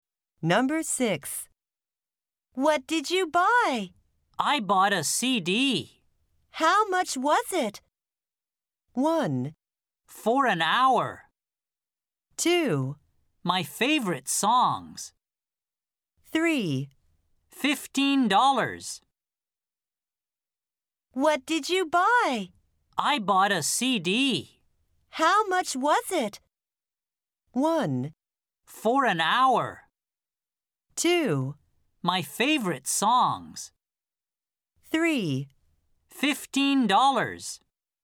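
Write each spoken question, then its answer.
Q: How much was it?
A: 3: $15.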